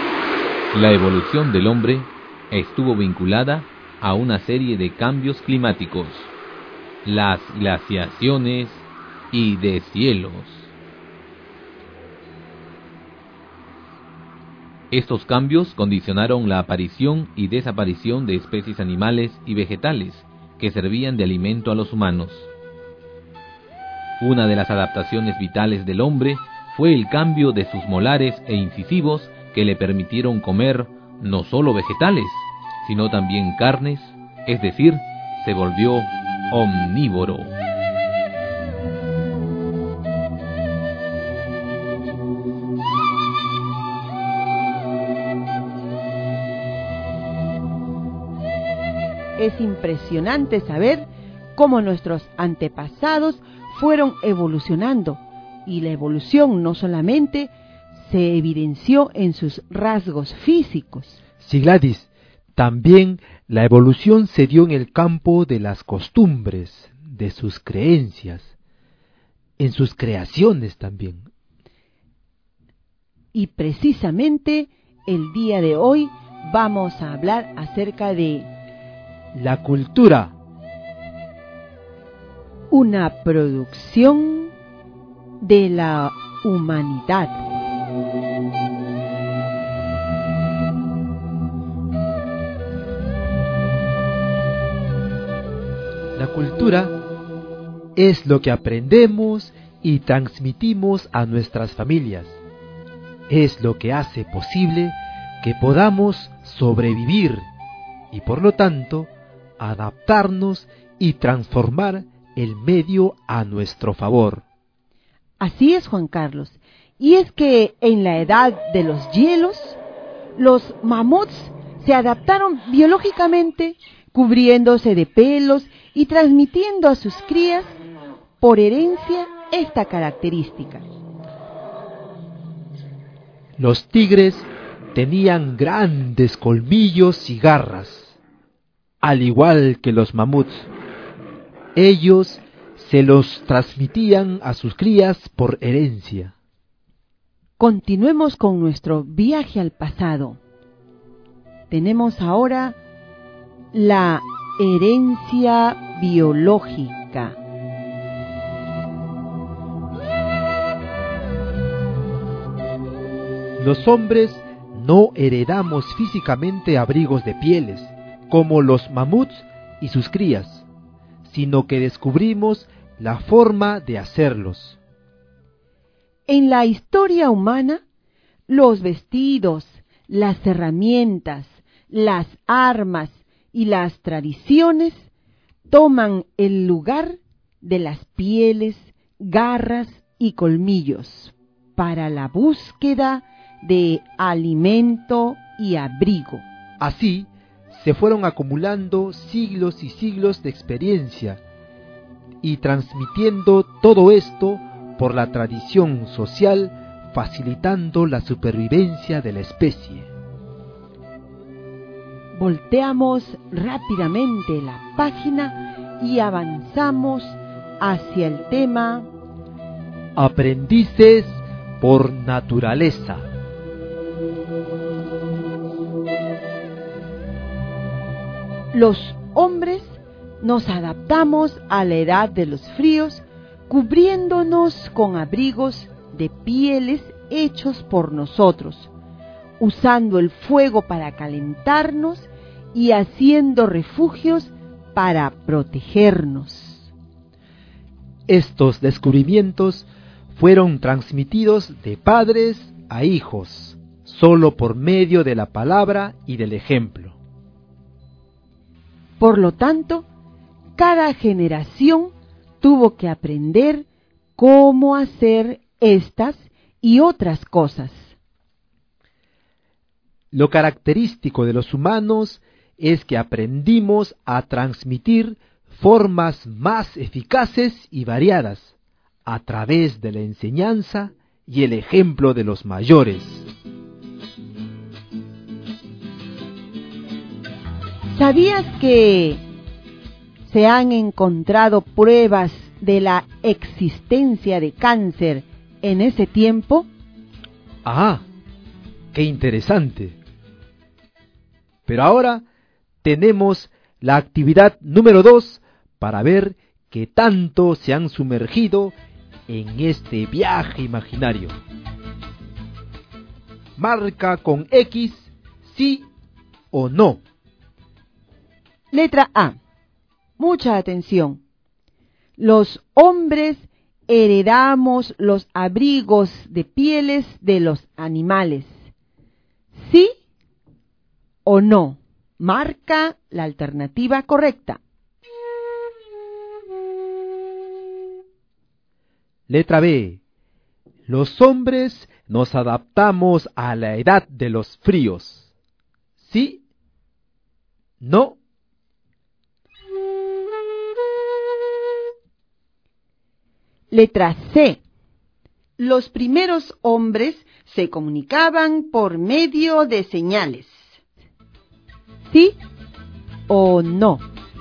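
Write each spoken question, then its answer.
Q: Los hombres heredamos los abrigos de pieles de los animales.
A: No

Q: Los hombres nos adaptamos a la edad de los fríos.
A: Sí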